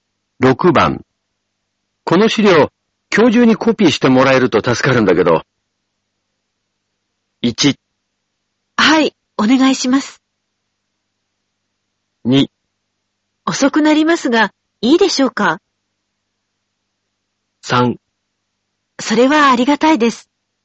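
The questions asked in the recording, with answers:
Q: この資料、今日中にコピーしてもらえると助かるんだけど。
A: 2: 遅くなりますが、いいでしょうか。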